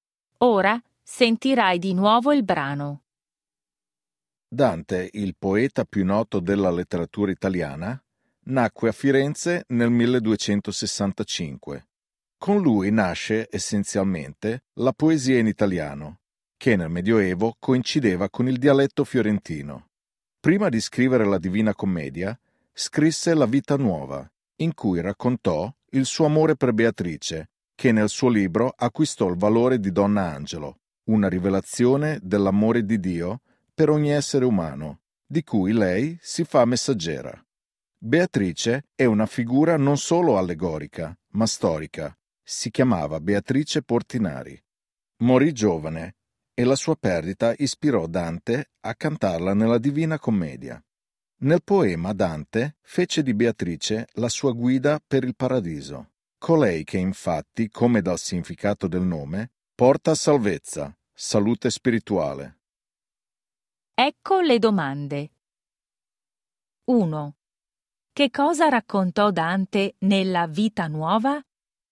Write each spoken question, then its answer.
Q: Che cosa raccontò Dante nella Vita Nuova?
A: Raccontò il suo amore per Beatrice.